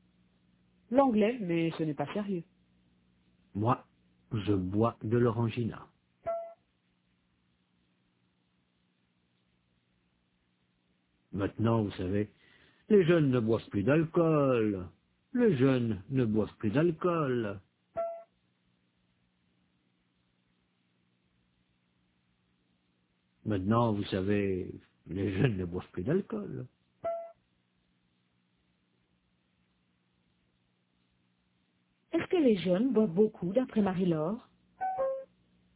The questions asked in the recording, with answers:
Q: Est-ce que les jeunes boivent beaucoup, d'après Marie-Laure?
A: Non, ils ne boivent plus d'alcool.